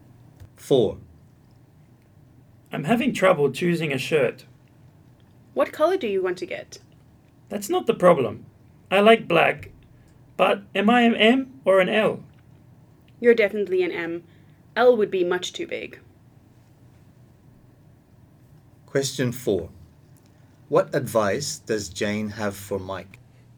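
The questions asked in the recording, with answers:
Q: What advice does Jane have for Mike?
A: To get a size M shirt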